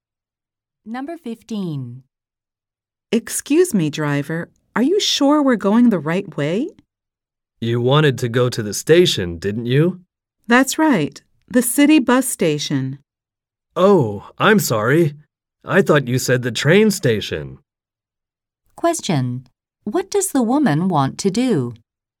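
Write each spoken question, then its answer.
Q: What does the woman want to do?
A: Go to the city bus station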